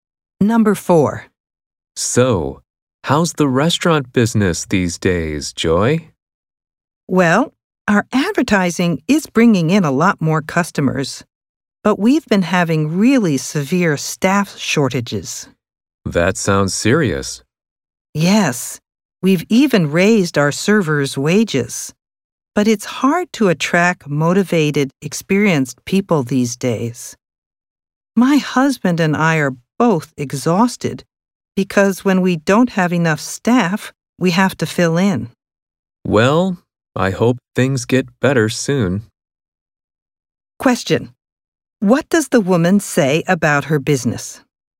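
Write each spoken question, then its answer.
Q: What does the woman say about her business?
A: It does not have enough staff.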